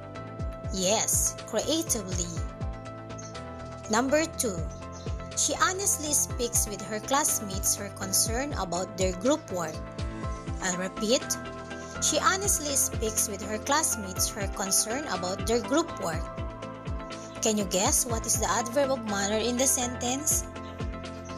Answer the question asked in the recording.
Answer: Correct. Honestly.